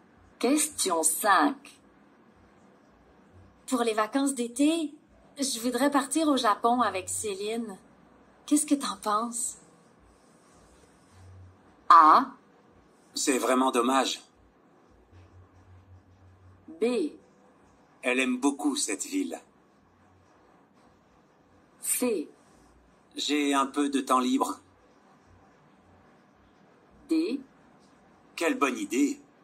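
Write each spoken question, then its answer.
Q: Qu'est-ce que t'en penses?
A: D: Quelle bonne idée!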